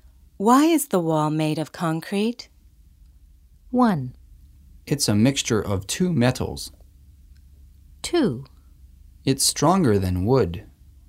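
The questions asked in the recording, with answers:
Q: Why is the wall made of concrete?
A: 2: It's stronger than wood.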